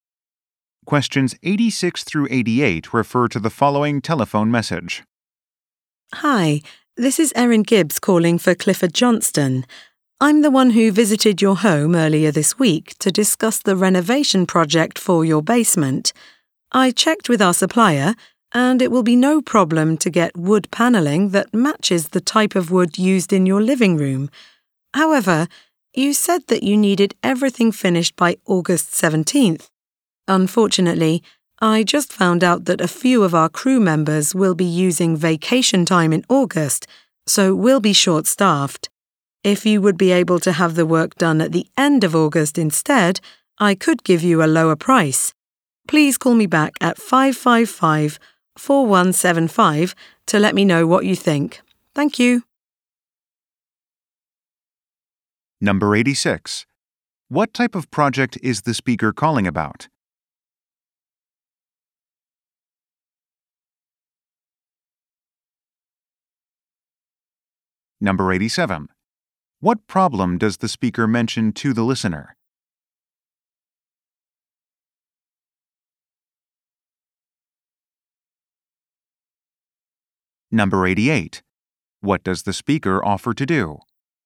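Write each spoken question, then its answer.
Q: What type of project is the speaker calling about?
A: A basement renovation

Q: What problem does the speaker mention to the listener?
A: The crew will be short-staffed in August

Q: What does the speaker offer to do?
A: Give a lower price if the work is done at the end of August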